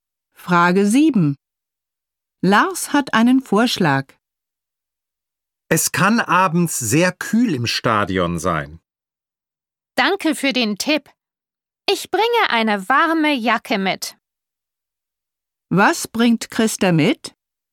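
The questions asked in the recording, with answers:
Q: Was bringt Christa mit?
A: Eine warme Jacke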